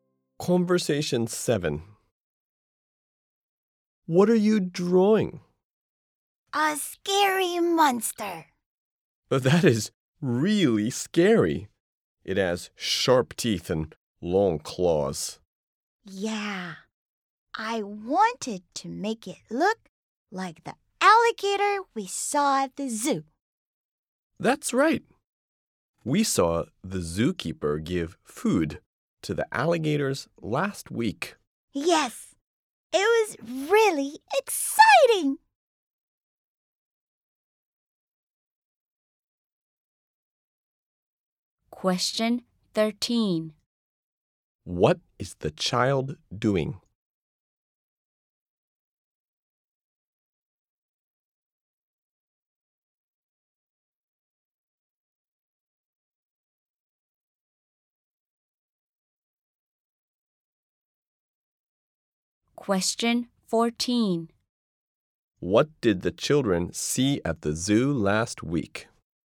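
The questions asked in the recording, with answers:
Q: What is the child doing?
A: Drawing a scary monster

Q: What did the children see at the zoo last week?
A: The zookeeper feeding the alligators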